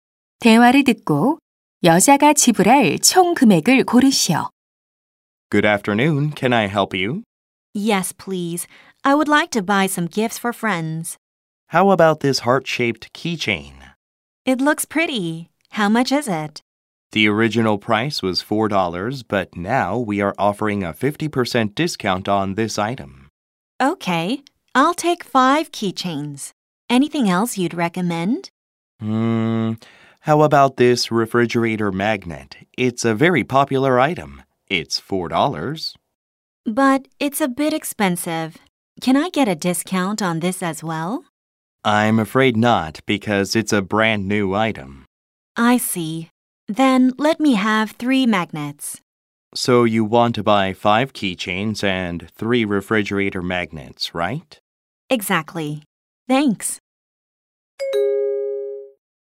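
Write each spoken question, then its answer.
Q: 대화를 듣고 여자가 지불할 총 금액을 고르시오.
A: $22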